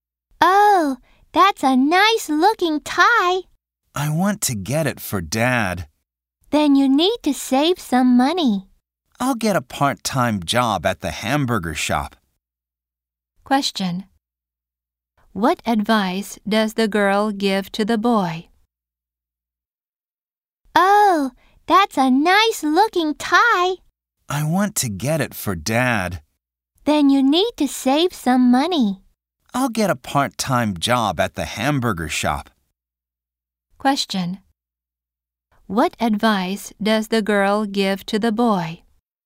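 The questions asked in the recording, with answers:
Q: What advice does the girl give to the boy?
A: To save some money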